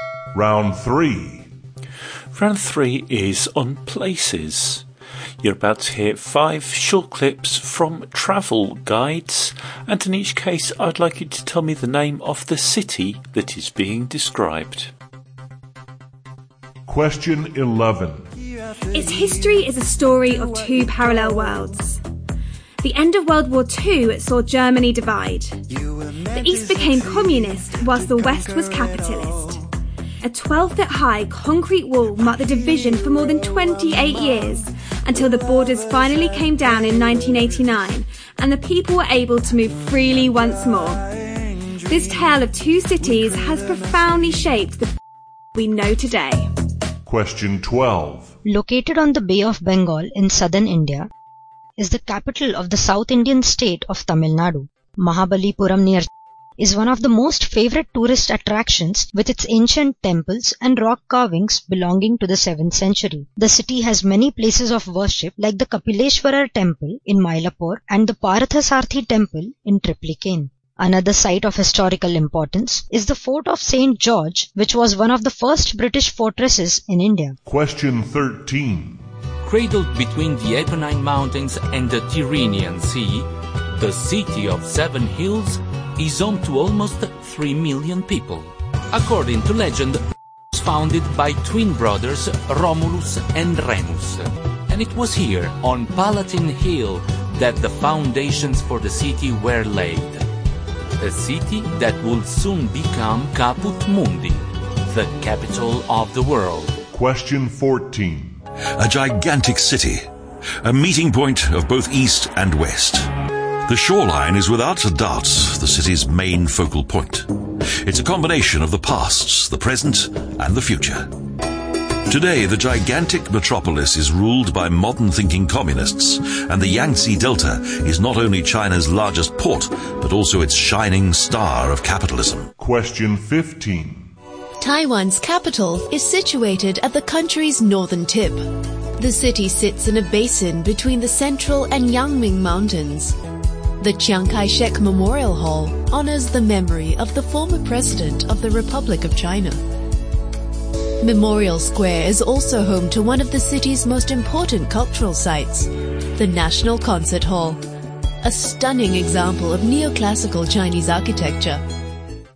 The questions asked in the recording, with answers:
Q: I'd like you to tell me the name of the city that is being described.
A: number 11 was Berlin.

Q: I'd like you to tell me the name of the city that is being described.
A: 12 was Chennai.

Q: I'd like you to tell me the name of the city that is being described.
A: Number 13 was Rome.

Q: I'd like you to tell me the name of the city that is being described.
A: Number 14 was Shanghai.

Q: I'd like you to tell me the name of the city that is being described.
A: And number 15 was Taipei.